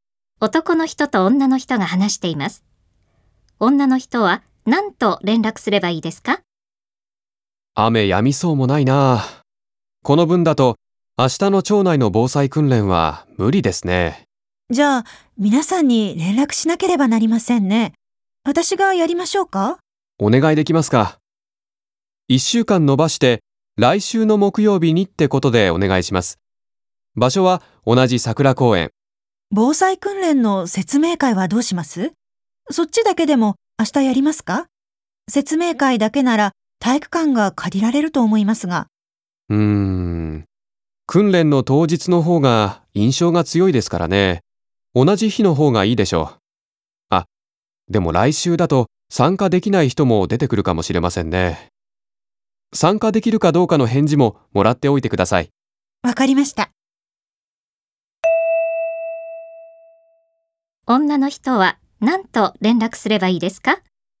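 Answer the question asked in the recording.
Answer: 防災訓練と説明会を来週の木曜日に桜公園で一緒に行うことを伝え、参加できるかどうかの返事をもらう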